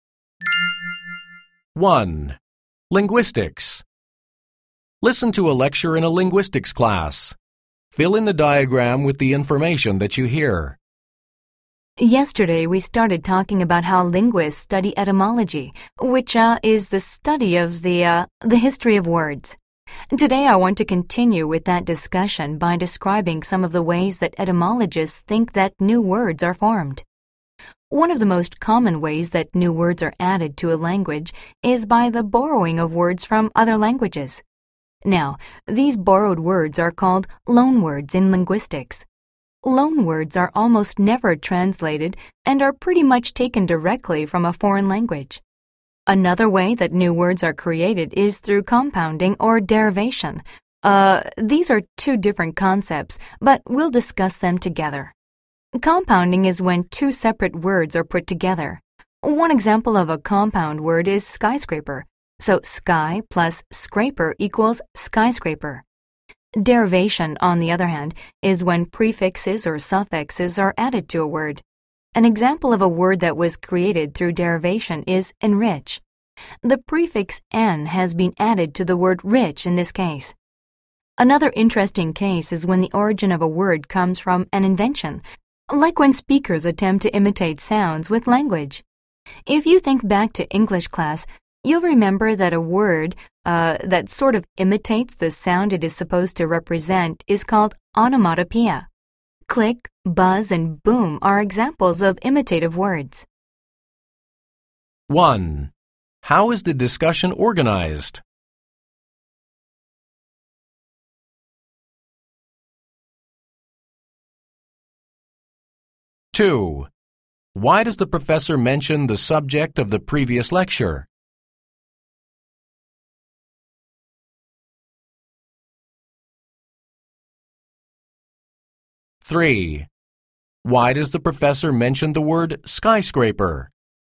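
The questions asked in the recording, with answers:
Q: Why does the professor mention the word skyscraper?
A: As an example of a compound word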